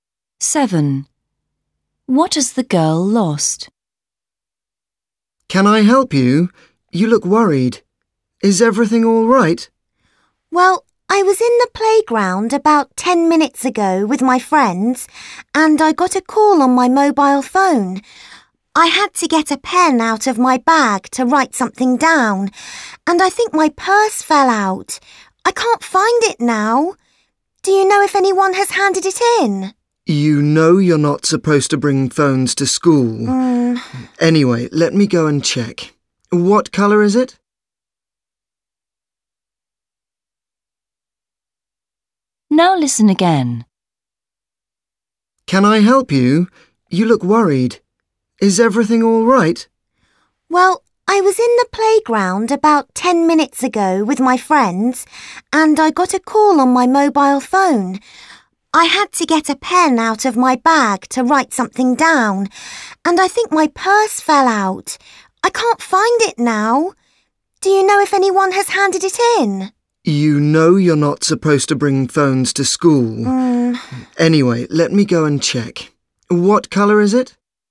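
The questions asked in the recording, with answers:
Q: What has the girl lost?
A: Her purse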